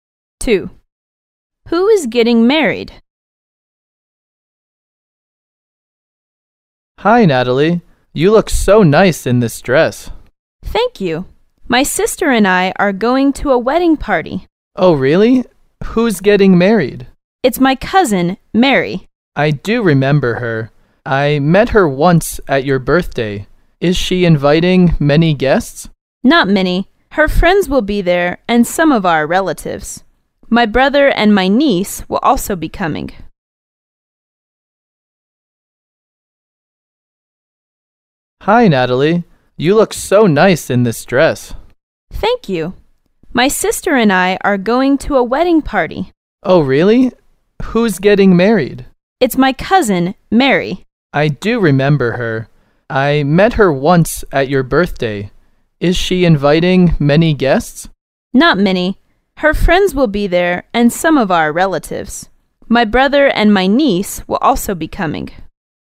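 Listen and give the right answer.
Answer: Natalie's cousin Mary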